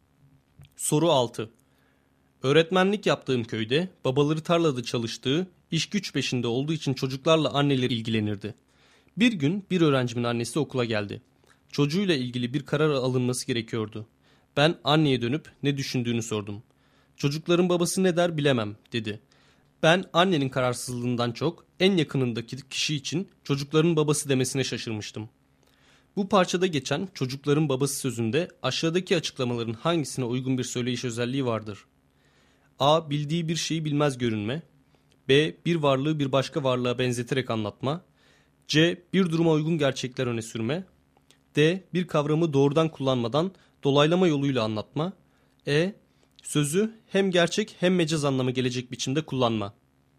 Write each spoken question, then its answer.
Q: Bu parçada geçen çocukların babası sözünde aşağıdaki açıklamaların hangisine uygun bir söyleyiş özelliği vardır?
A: Doğru cevap D şıkkı.